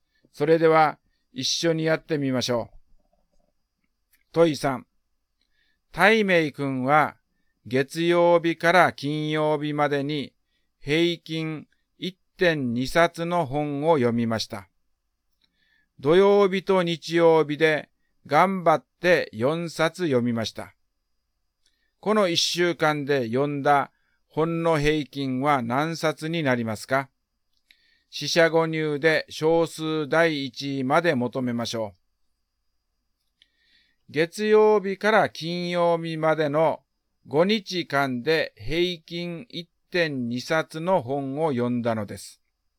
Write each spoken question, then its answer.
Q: この1週間で読んだ本の平均は何冊になりますか?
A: 答えは1.4 冊になります。